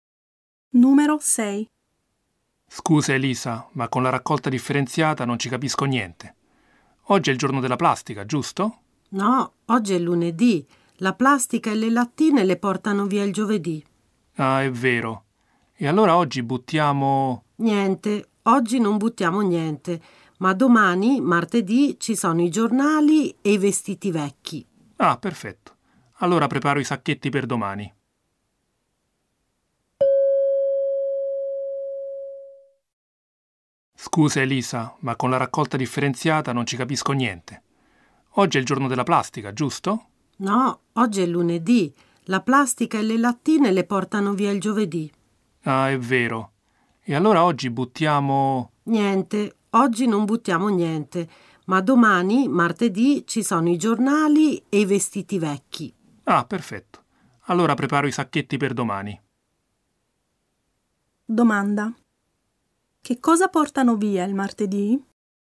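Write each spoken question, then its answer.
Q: Che cosa portano via il martedì?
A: I giornali e i vestiti vecchi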